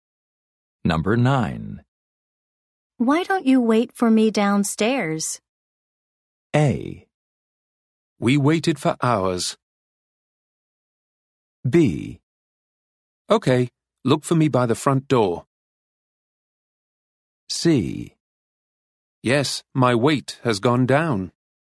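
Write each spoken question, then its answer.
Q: Why don't you wait for me downstairs?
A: B: Okay, look for me by the front door.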